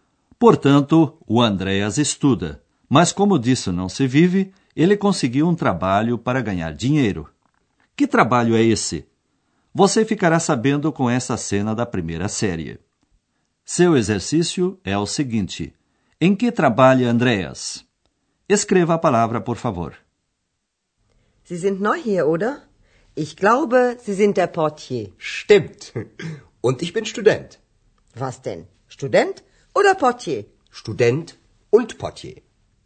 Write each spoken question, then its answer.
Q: Em que trabalha Andreas?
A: Sua profissão é portier.